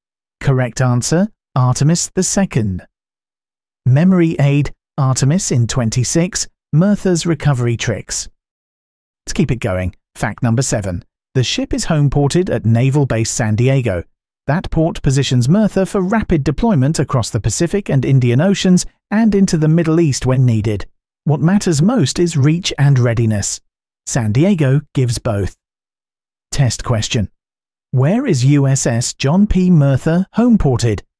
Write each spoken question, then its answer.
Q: Where is USS John P. Mirtha homeported?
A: correct answer, Naval Base San Diego.